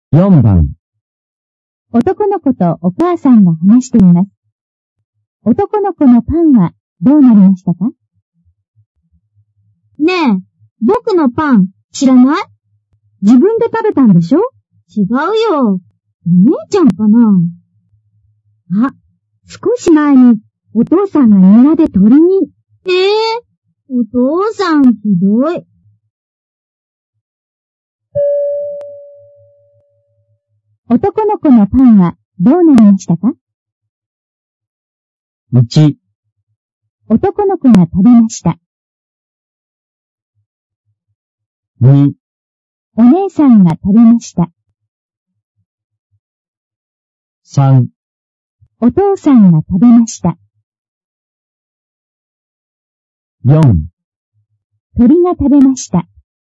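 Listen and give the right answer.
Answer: 4: 鳥が食べました。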